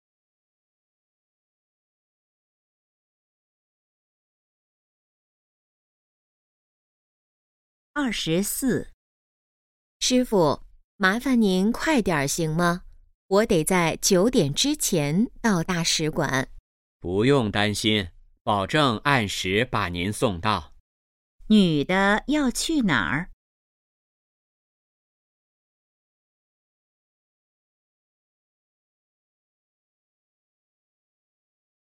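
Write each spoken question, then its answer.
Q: 女的要去哪儿?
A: 大使馆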